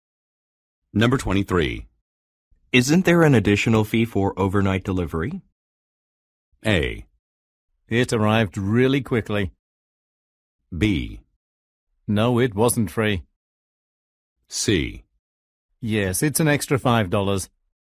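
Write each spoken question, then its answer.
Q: Isn't there an additional fee for overnight delivery?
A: C: Yes, it's an extra $5.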